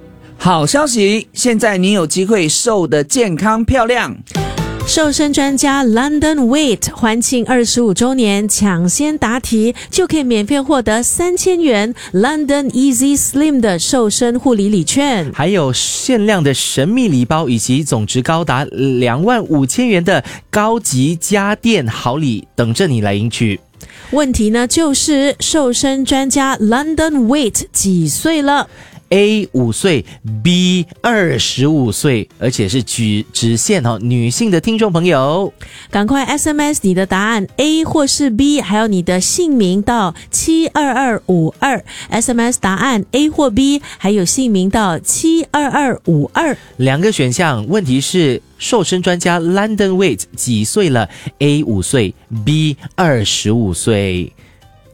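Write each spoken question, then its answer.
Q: 问题是瘦身专家 London Weight 几岁了?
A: B: 25岁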